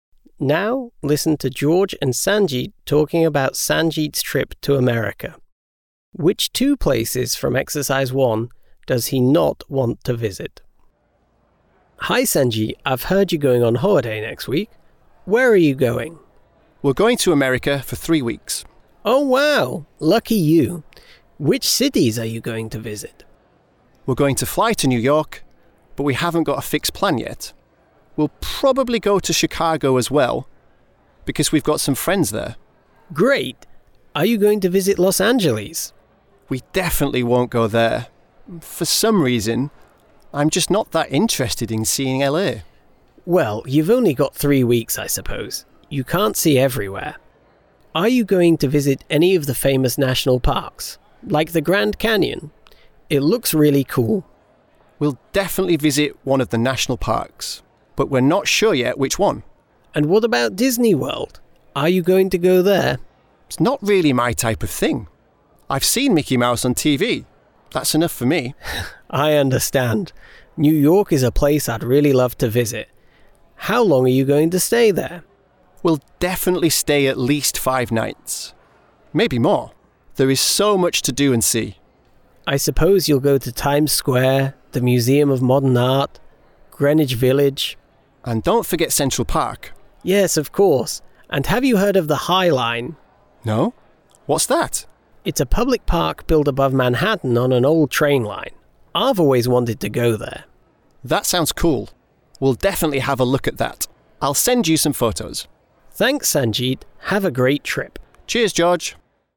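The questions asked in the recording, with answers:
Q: Which two places from Exercise 1 does he not want to visit?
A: Los Angeles and Disney World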